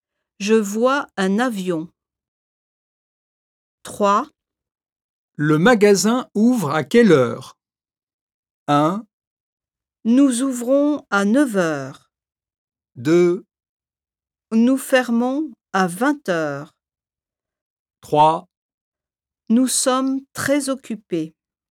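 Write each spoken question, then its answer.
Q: Le magasin ouvre à quelle heure ?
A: 1: Nous ouvrons à 9 heures.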